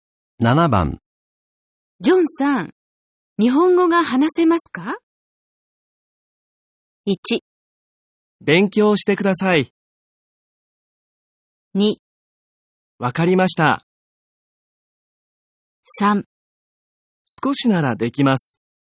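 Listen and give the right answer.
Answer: 3: 少しならできます。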